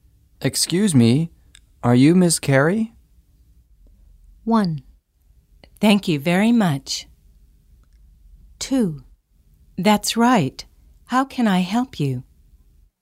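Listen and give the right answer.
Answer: 2: That's right. How can I help you?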